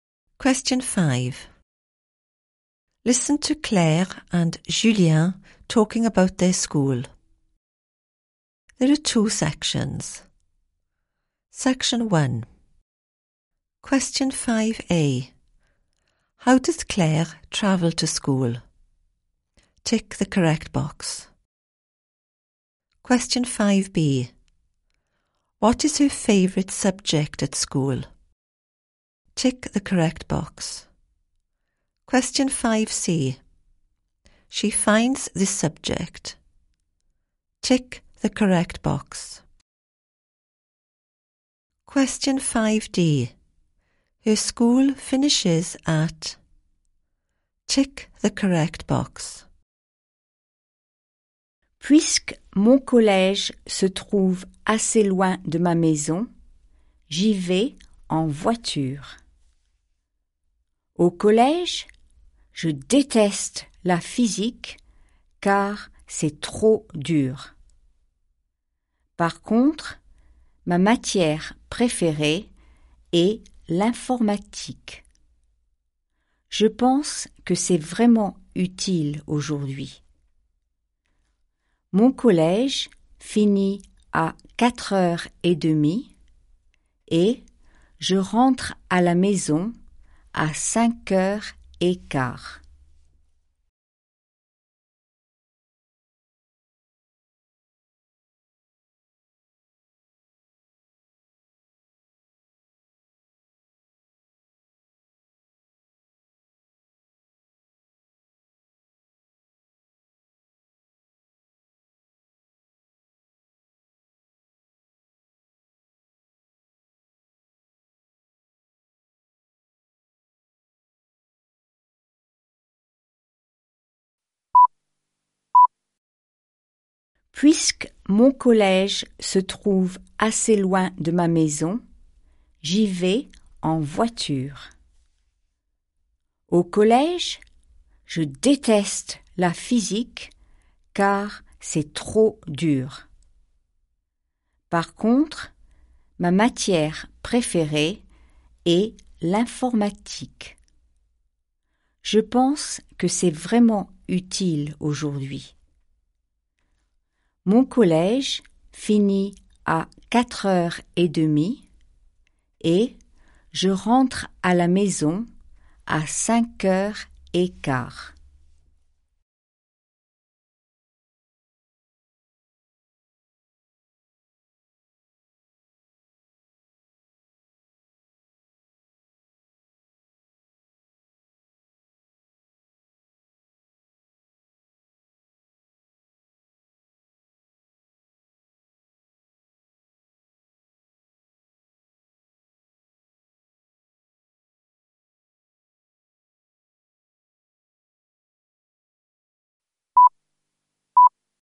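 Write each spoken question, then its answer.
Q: How does Claire travel to school?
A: By car

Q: What is her favourite subject at school?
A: ICT / computing

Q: She finds this subject.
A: Really useful

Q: Her school finishes at.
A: 4:30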